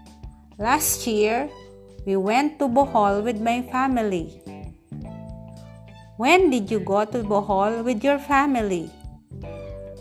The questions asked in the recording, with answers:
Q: When did you go to Bohol with your family?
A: Last year.